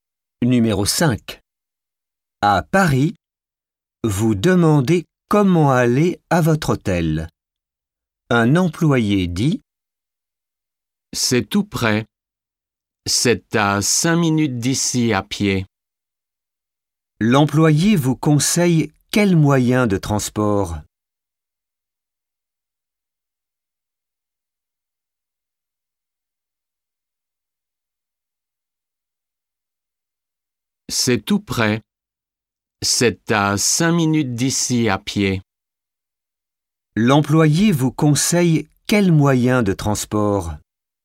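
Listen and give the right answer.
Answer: À pied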